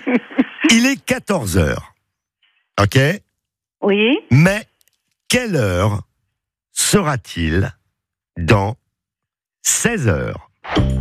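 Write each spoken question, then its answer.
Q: Mais quelle heure sera-t-il dans 16h?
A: 6h (du matin)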